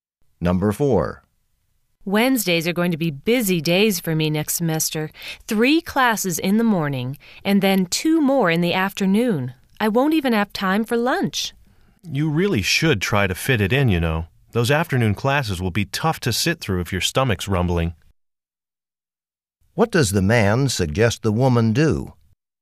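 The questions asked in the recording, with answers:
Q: What does the man suggest the woman do?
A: Make time to eat lunch on Wednesdays.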